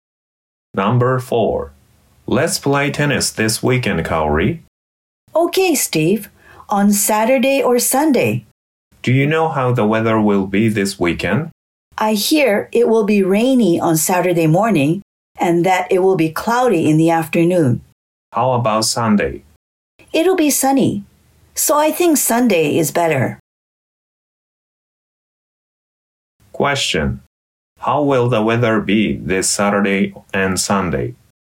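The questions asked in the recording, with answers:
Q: How will the weather be this Saturday and Sunday?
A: Saturday: rainy in the morning, cloudy in the afternoon; Sunday: sunny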